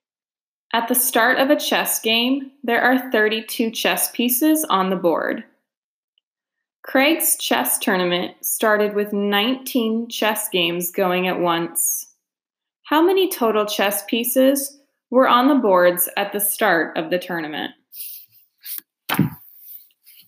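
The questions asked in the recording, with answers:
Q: How many total chess pieces were on the boards at the start of the tournament?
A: 608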